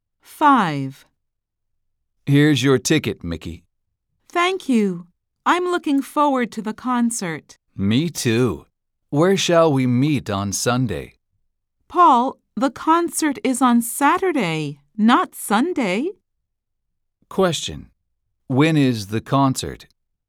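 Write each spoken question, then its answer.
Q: When is the concert?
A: On Saturday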